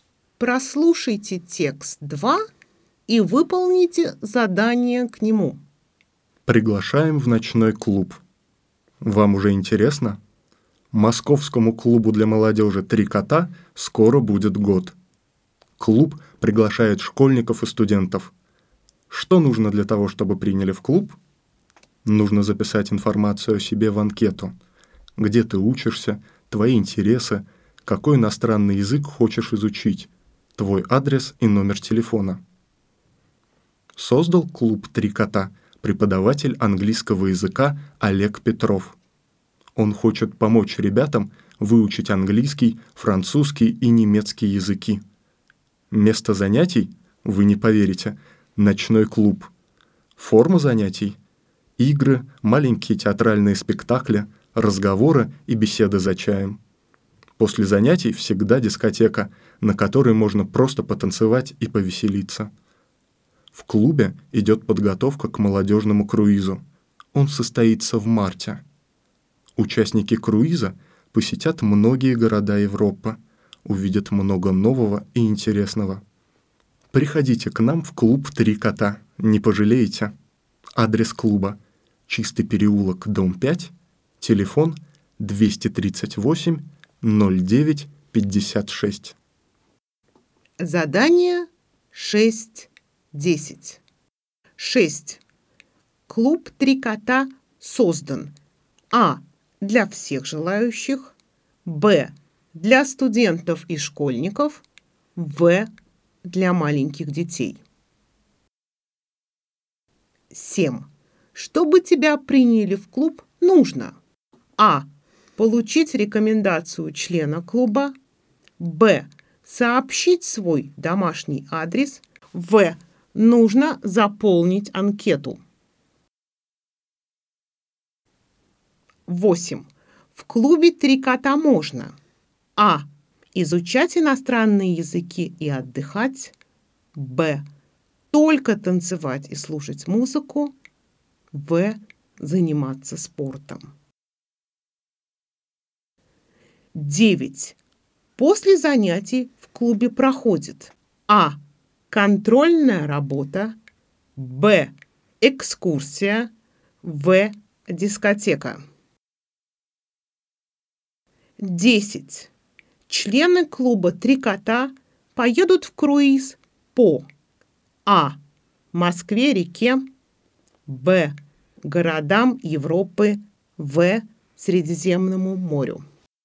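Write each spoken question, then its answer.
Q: Клуб «Три кота» создан:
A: б: для студентов и школьников

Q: Чтобы тебя приняли в клуб, нужно:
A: в: нужно заполнить анкету

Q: В клубе «Три кота» можно:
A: а: изучать иностранные языки и отдыхать

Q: После занятий в клубе проходит:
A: в: дискотека

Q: Члены клуба «Три кота» поедут в круиз по:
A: б: городам Европы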